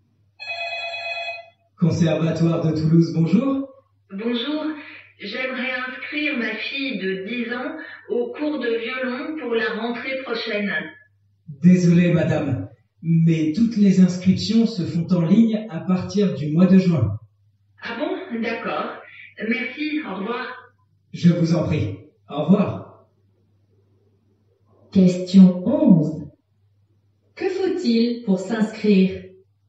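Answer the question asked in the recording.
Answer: S'inscrire en ligne à partir du mois de juin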